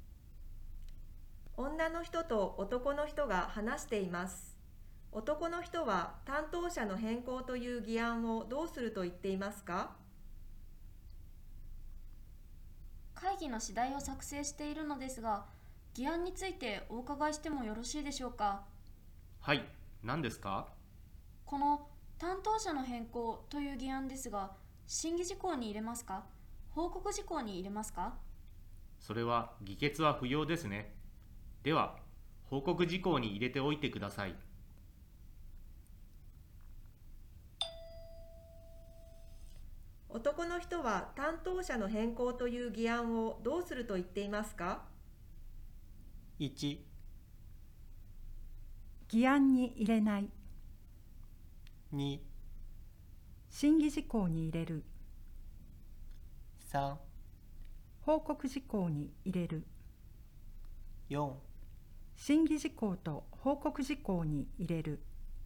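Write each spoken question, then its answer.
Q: 男の人は担当者の変更という議案をどうすると言っていますか?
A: 3: 報告事項に入れる。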